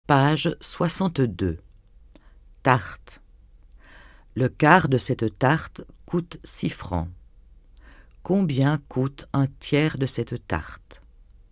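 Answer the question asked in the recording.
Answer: 8 francs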